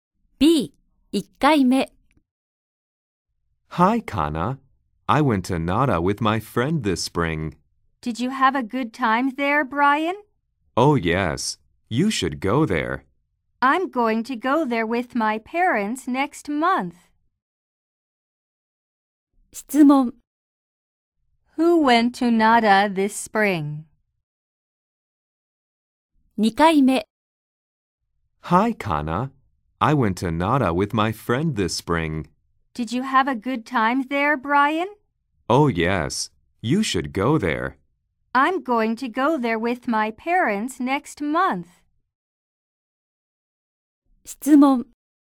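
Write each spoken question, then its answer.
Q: Who went to Nara this spring?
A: Brian and his friend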